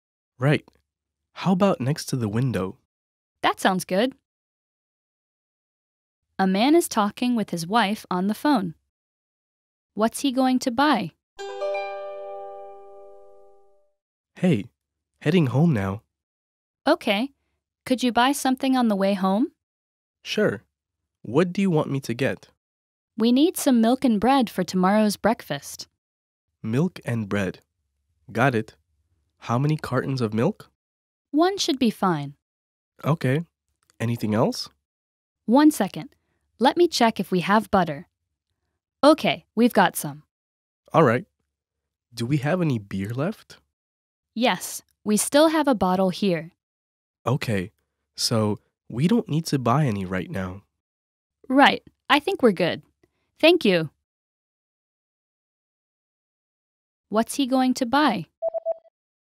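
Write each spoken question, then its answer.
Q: What's he going to buy?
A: Milk (one carton) and bread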